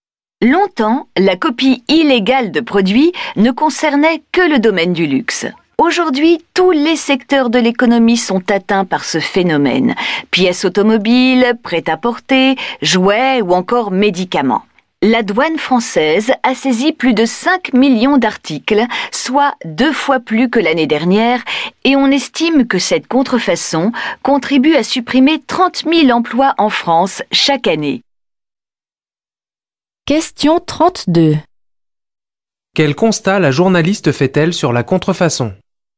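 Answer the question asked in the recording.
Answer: Elle touche désormais tous les secteurs de l'économie, plus seulement le luxe, et elle est en forte hausse (saisies doublées).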